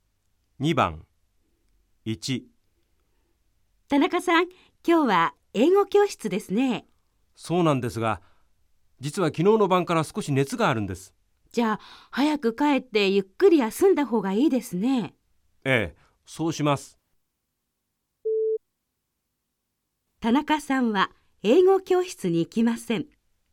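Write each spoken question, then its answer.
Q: 田中さんは英語教室に行きません。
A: ○(正しい)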